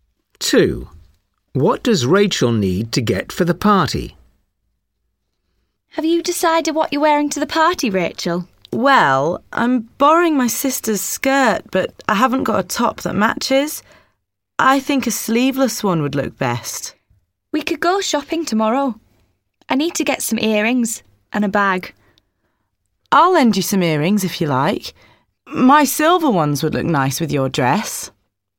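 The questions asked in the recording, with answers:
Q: What does Rachel need to get for the party?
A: a top (a sleeveless one)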